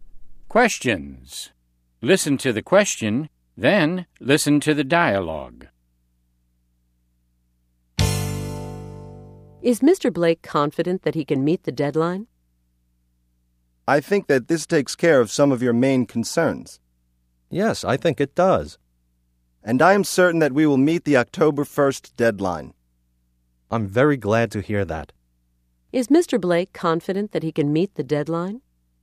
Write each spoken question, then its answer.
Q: Is Mr. Blake confident that he can meet the deadline?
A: Yes, he is. He is certain he can meet the deadline.